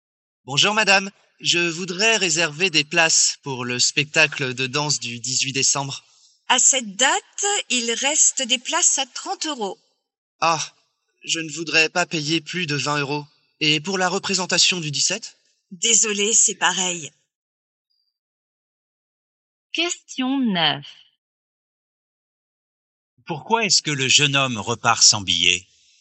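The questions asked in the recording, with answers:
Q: Pourquoi est-ce que le jeune homme repart sans billet?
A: Les places sont trop chères (30 euros)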